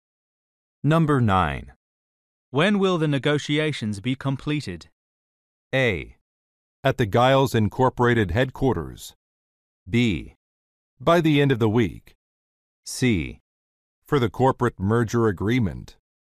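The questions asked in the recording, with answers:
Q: When will the negotiations be completed?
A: B: By the end of the week.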